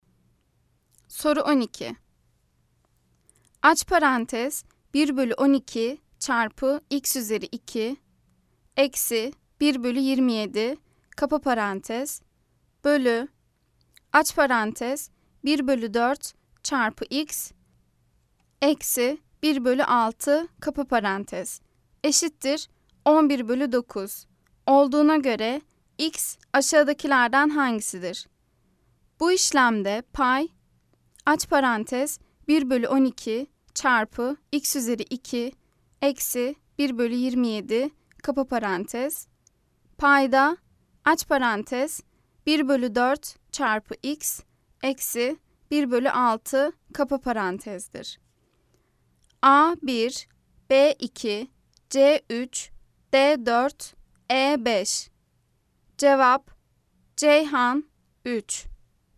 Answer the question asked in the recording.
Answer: Cevap Ceyhan 3.